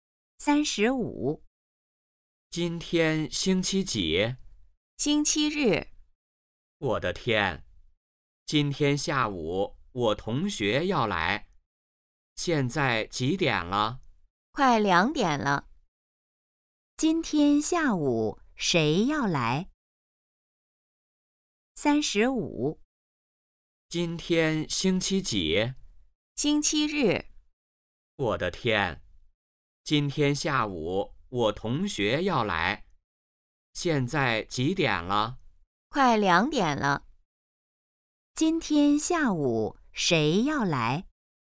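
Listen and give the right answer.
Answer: 同学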